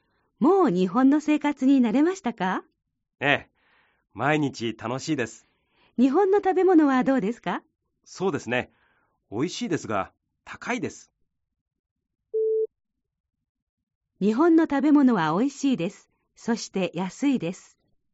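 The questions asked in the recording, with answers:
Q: 日本の食べ物はおいしいです。そして安いです。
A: ×(おいしいですが高いです)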